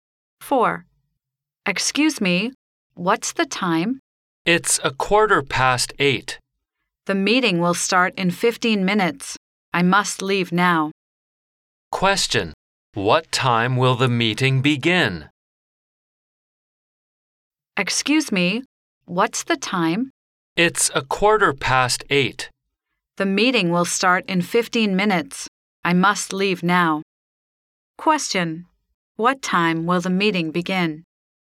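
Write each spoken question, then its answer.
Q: What time will the meeting begin?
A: 8:30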